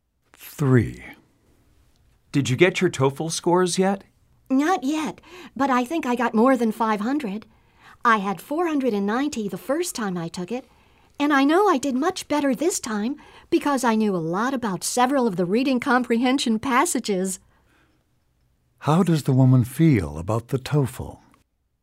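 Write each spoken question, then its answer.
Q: How does the woman feel about the TOEFL?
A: She is confident she did better this time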